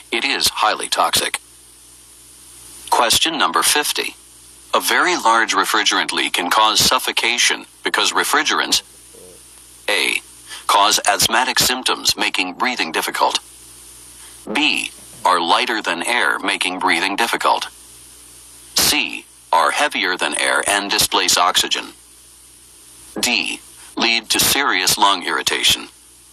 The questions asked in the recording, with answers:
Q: A very large refrigerant leak can cause suffocation because refrigerants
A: The correct answer is C, are heavier than air and displace oxygen.